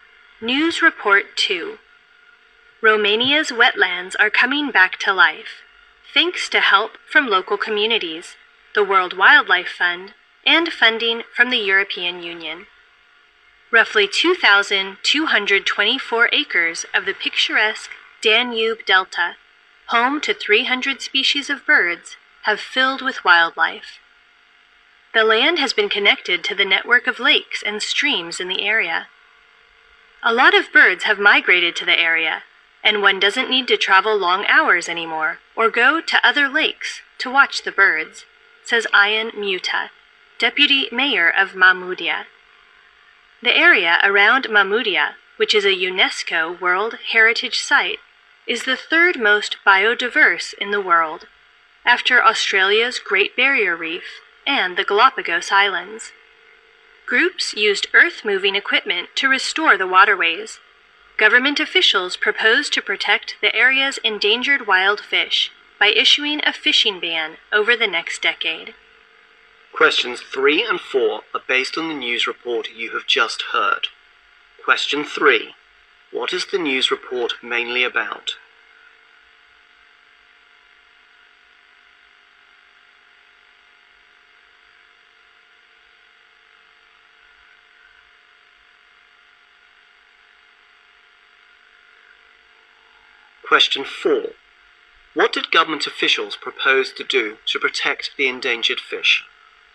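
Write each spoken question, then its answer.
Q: What is the news report mainly about?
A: The restoration of Romania's wetlands in the Danube Delta

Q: What did government officials propose to do to protect the endangered fish?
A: Issue a fishing ban over the next decade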